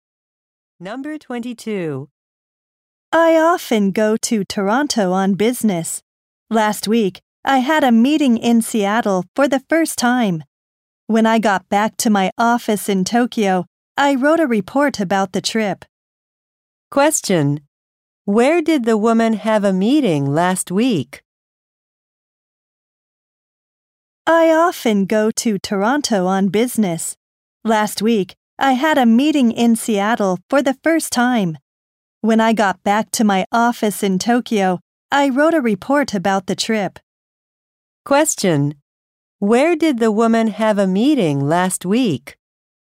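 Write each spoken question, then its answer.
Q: Where did the woman have a meeting last week?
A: In Seattle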